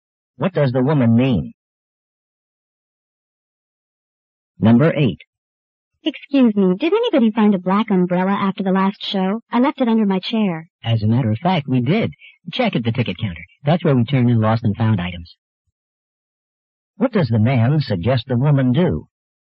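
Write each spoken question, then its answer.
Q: What does the man suggest the woman do?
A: Check at the ticket counter.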